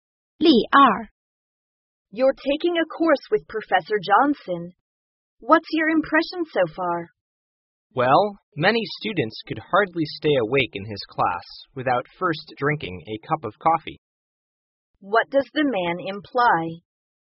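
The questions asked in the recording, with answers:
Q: What does the man imply?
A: Professor Johnson's class is boring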